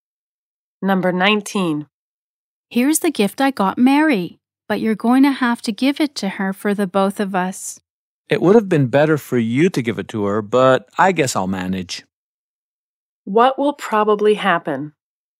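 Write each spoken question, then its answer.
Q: What will probably happen?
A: The second speaker will give Mary the gift from both of them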